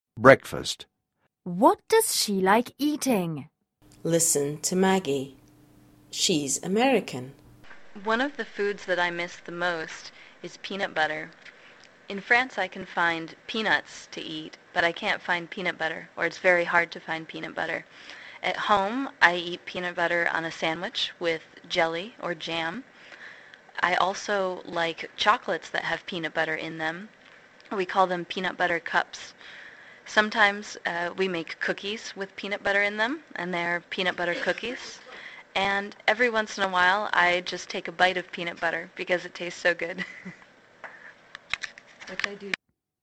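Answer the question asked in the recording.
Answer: Peanut butter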